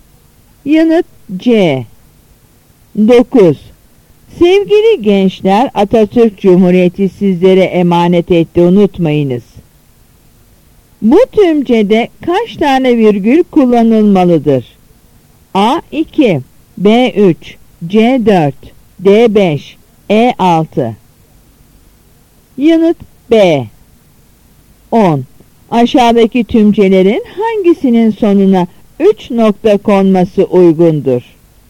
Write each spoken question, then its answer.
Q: Bu tümcede kaç tane virgül kullanılmalıdır?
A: Yanıt B.